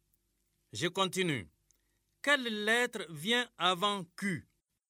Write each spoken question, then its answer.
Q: Quelle lettre vient avant Q?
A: Monsieur, c'est P.